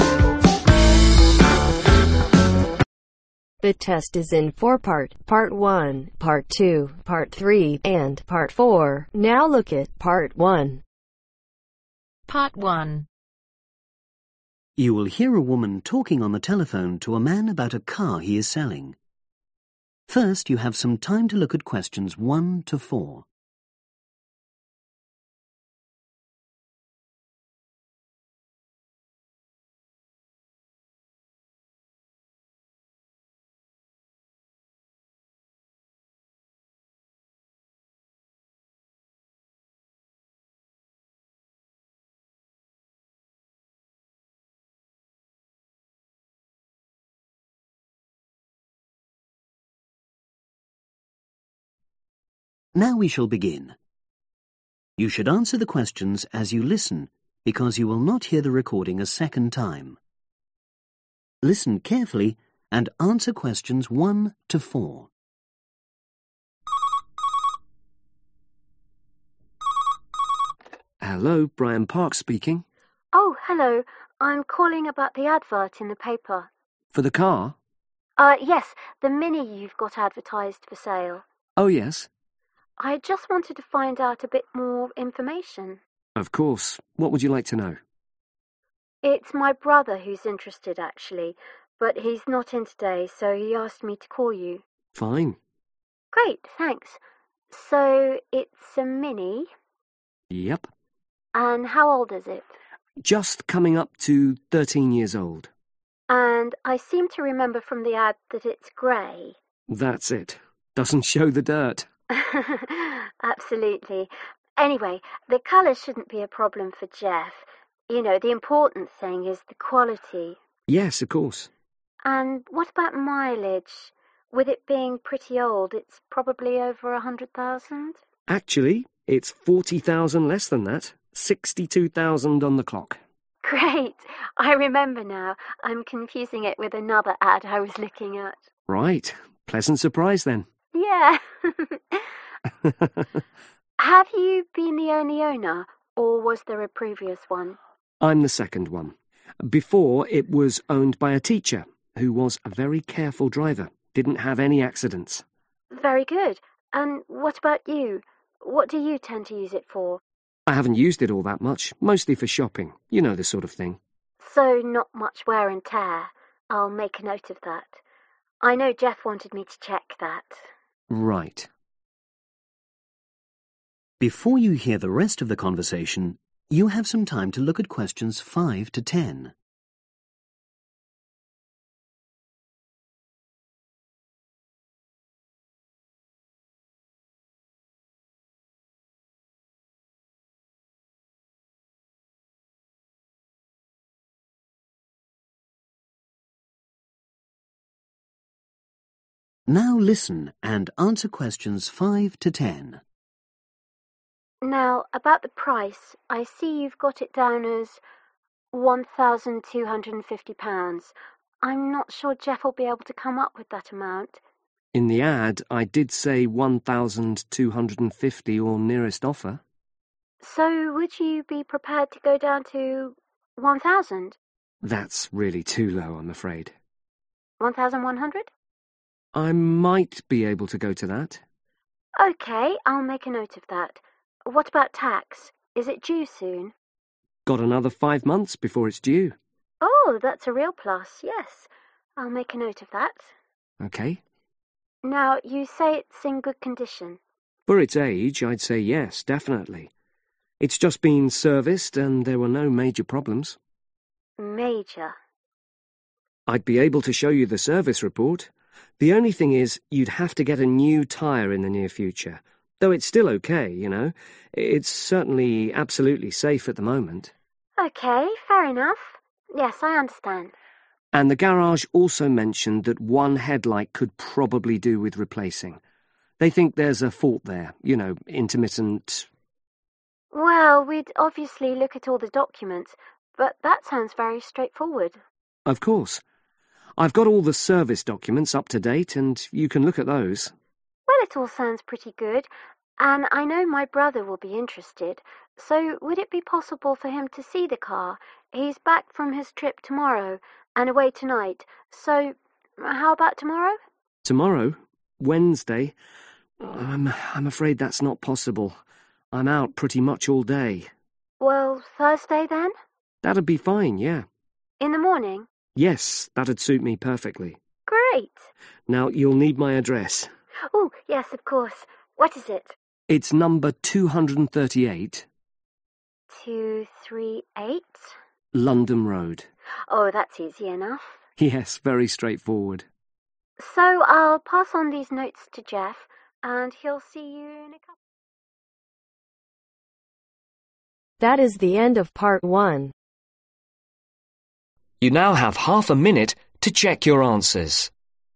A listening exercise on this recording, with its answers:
Complete the notes below. Write ONE WORD OR A NUMBER for each answer.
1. Color: (1) ............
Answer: grey/gray

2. Mileage: (2) ............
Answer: 62,000

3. Previous owner was a (3) ............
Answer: teacher

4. Current owner has used car mainly for (4) ............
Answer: shopping

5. Price: may accept offers from (5) ............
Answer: 1,100

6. (Note: (6) ............ not due for 5 months)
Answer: tax

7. Will need a new (7) ............ soon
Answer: Tyre

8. Minor problem with a (8) ............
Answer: headlight

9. Agreed to view the car on (9) ............ a.m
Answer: Thursday

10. 238, (10) ............ Road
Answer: London